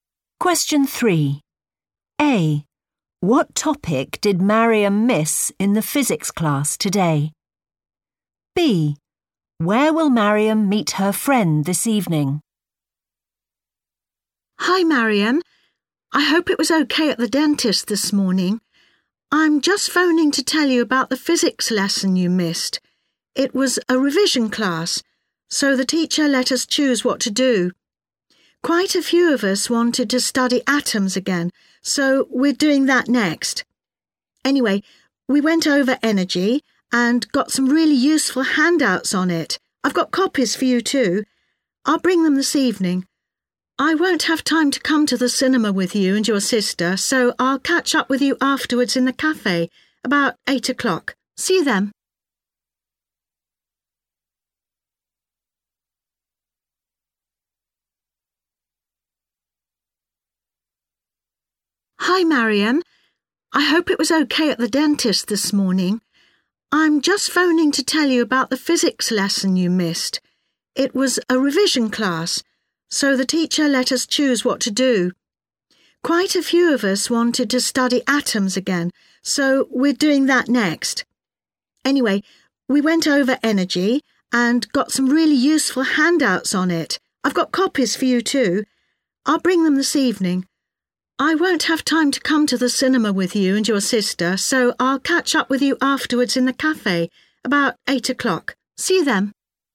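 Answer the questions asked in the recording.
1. energy
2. in the cafe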